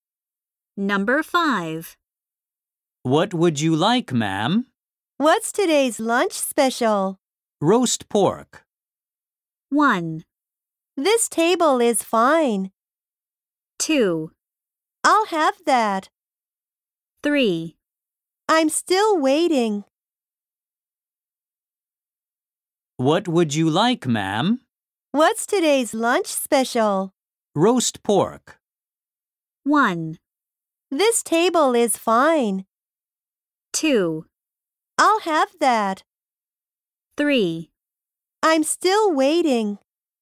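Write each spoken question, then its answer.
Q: Roast pork.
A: 2: I'll have that.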